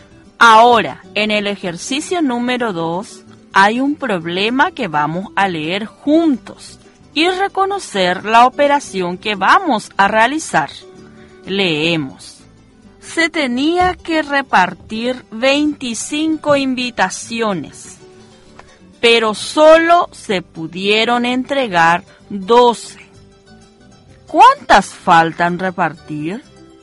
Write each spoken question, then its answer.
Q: ¿Cuántas faltan repartir?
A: 13 invitaciones.